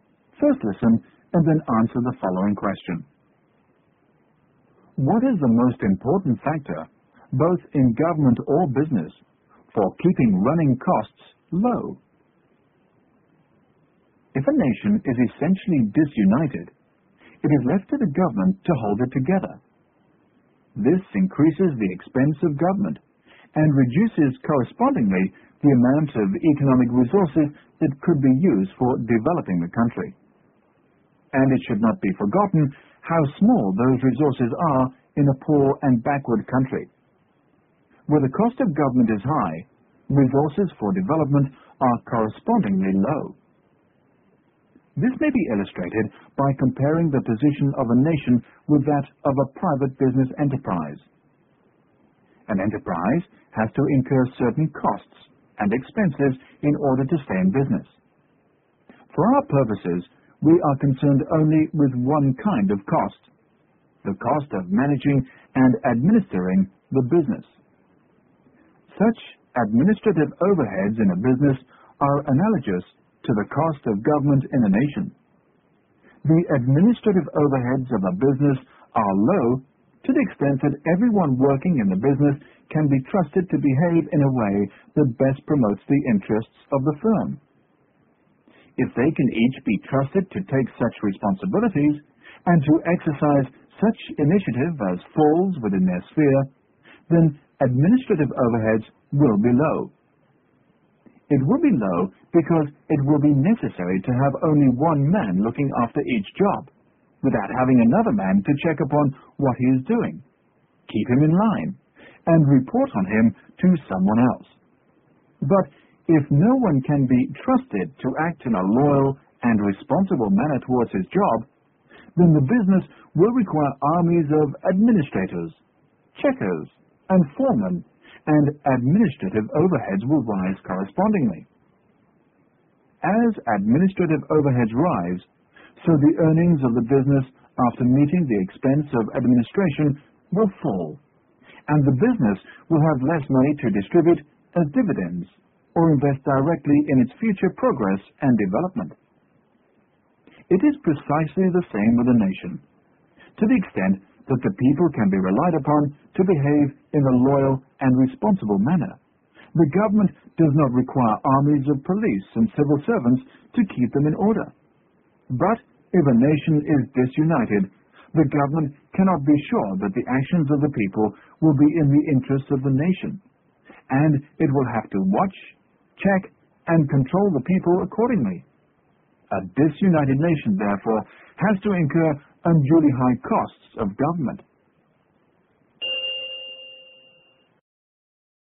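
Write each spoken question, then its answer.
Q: What is the most important factor, both in government or business, for keeping running costs low?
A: People can be trusted to behave loyally and responsibly (unity)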